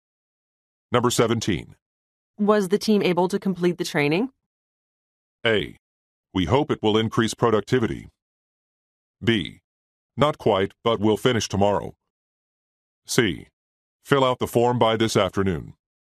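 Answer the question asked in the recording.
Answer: B: Not quite, but we'll finish tomorrow.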